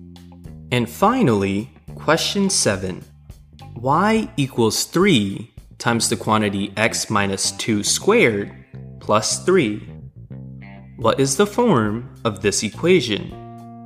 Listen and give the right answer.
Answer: This equation is in the vertex form.